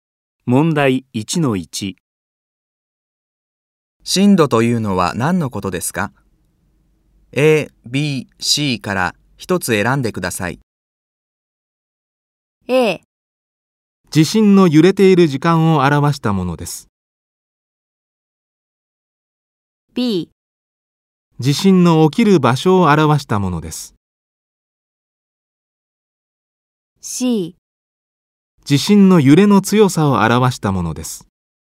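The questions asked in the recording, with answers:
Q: 震度というのは何のことですか?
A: C: 地震の揺れの強さを表したものです。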